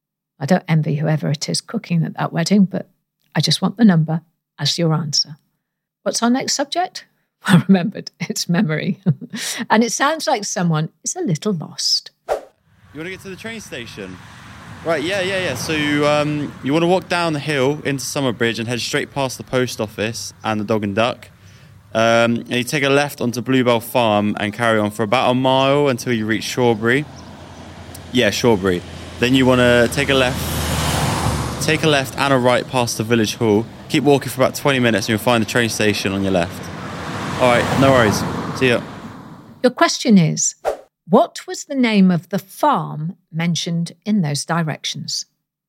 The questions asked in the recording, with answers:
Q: Your question is, what was the name of the farm mentioned in those directions?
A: And the answer was Bluebell Farm.